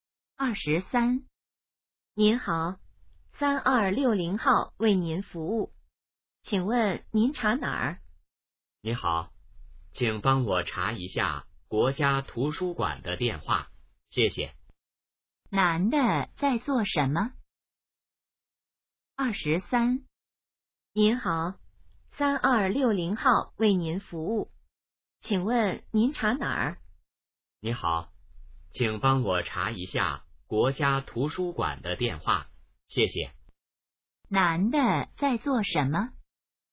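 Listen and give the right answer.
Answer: 打电话查电话号码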